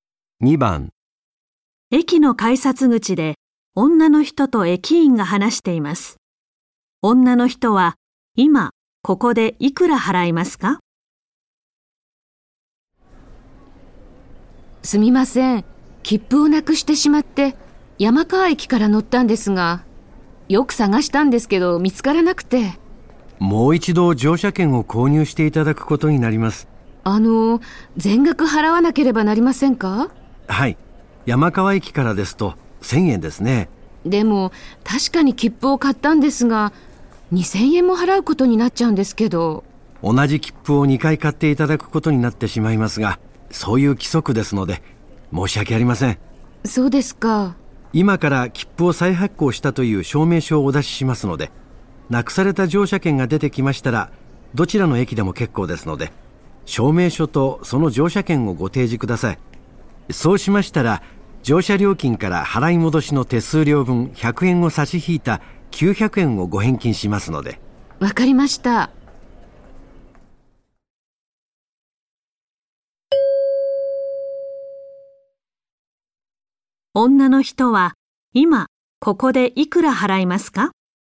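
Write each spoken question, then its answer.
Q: 女の人は今ここでいくら払いますか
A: 1000円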